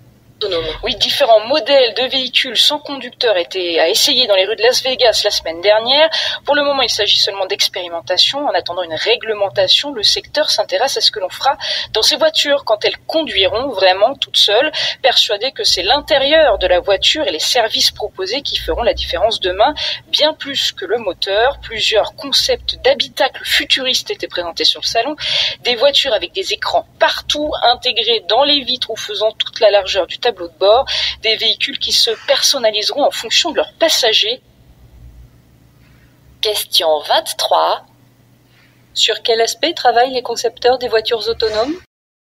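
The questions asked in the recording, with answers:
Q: Sur quel aspect travaillent les concepteurs des voitures autonomes ?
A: L'intérieur de la voiture (l'habitacle) et les services proposés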